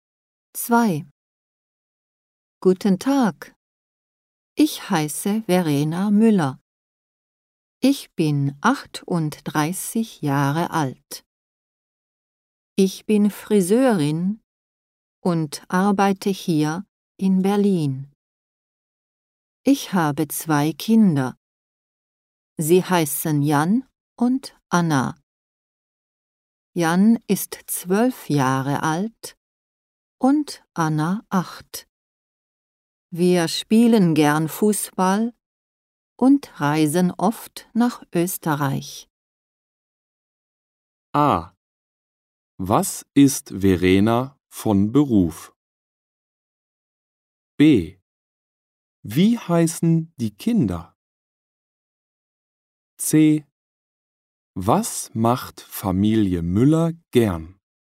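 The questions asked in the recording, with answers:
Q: Was ist Verena von Beruf?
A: Friseurin

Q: Wie heißen die Kinder?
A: Jan und Anna

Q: Was macht Familie Müller gern?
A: Fußball spielen und nach Österreich reisen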